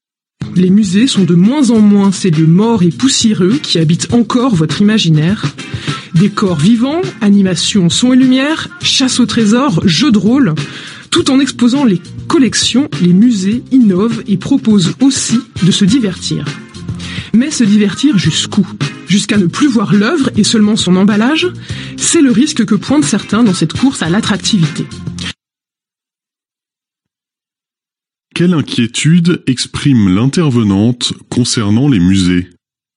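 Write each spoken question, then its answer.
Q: Quelle inquiétude exprime l'intervenante concernant les musées ?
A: Qu'à force de vouloir divertir, on ne voie plus l'œuvre mais seulement son emballage.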